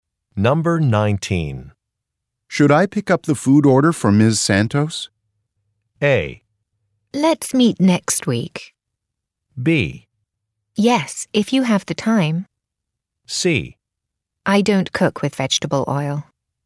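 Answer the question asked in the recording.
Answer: B: Yes, if you have the time.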